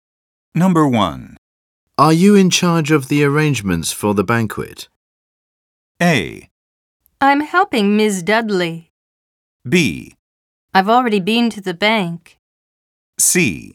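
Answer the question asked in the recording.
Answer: A: I'm helping Ms. Dudley.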